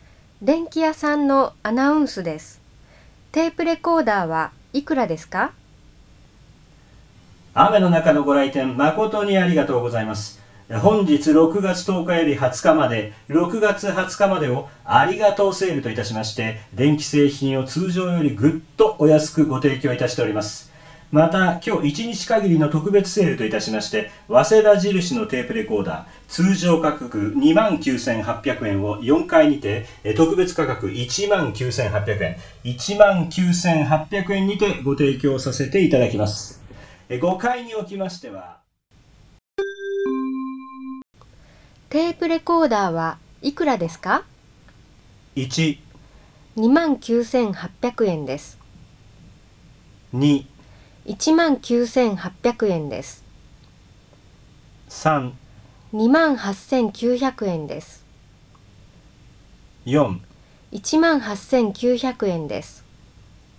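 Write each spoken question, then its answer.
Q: テープレコーダーはいくらですか?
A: 2: 19,800円です。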